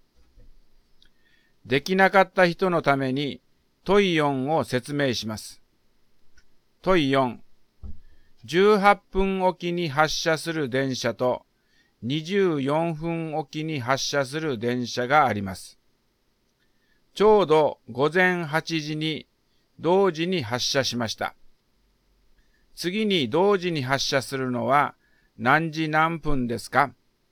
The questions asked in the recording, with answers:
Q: 次に同時に発車するのは何時何分ですか?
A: だから答えは9時12分です。